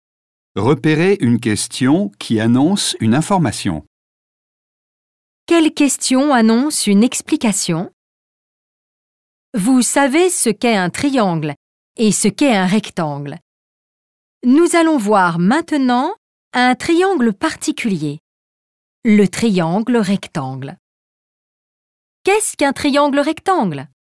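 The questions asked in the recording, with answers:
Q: Quelle question annonce une explication?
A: Qu'est-ce qu'un triangle rectangle?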